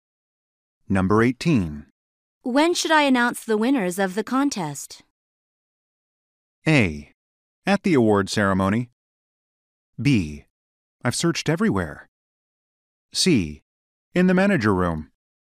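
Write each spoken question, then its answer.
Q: When should I announce the winners of the contest?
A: A: At the award ceremony.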